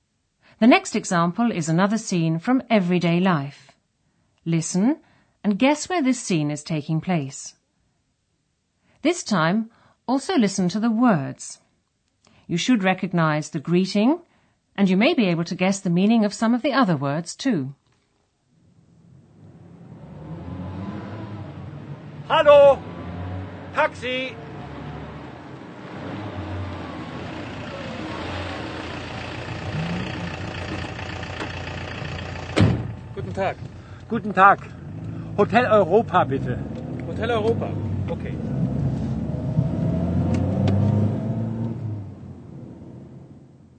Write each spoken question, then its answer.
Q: Listen and guess where this scene is taking place.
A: A man is on the street. He hails a taxi, which is the same word in German, and tells the driver he wants to go to a hotel.